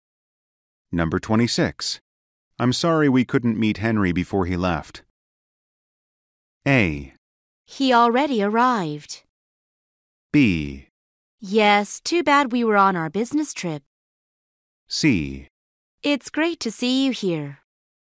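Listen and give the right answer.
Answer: B: Yes, too bad we were on our business trip.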